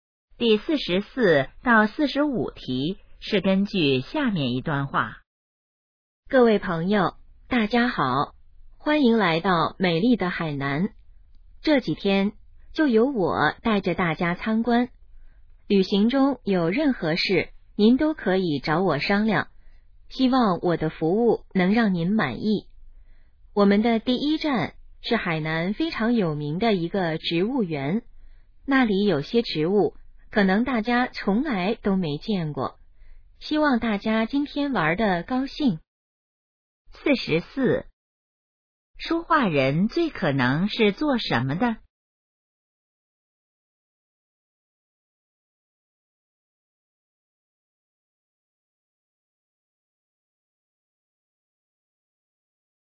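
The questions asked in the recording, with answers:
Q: 说话人最可能是做什么的?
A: 导游

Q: 关于那个植物园,下列哪个正确?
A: 很有名,有些植物大家没见过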